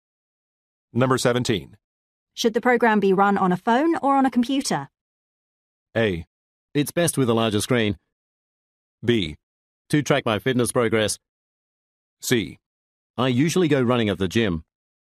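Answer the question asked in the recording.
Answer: A: It's best with a larger screen.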